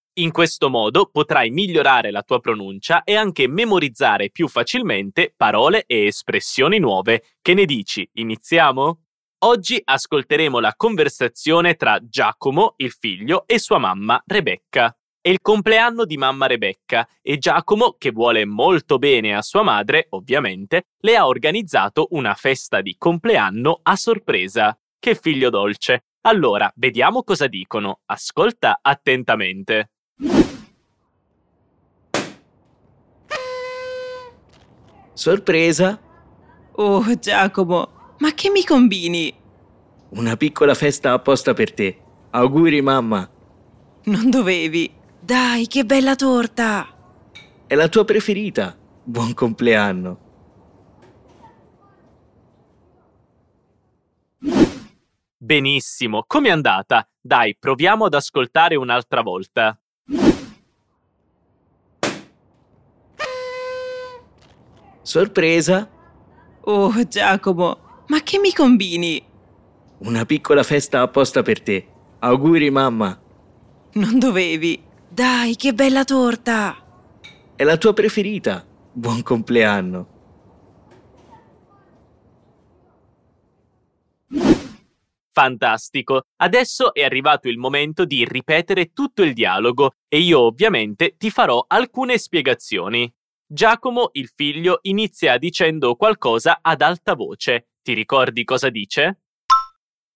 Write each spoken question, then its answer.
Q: Ti ricordi cosa dice?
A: Sorpresa!